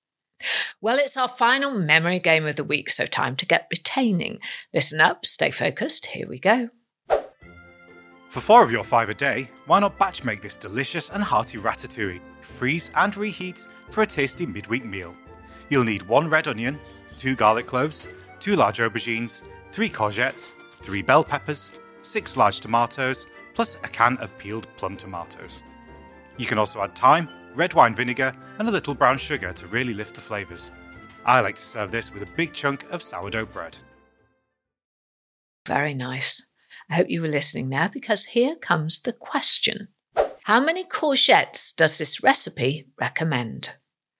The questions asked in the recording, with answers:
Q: How many courgettes does this recipe recommend?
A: Well, the answer was 3 courgettes for this lovely ratatouille recipe.